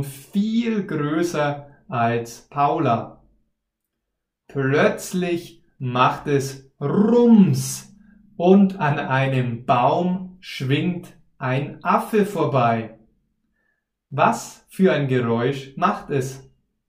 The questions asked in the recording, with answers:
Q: Was für ein Geräusch macht es?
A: Rums.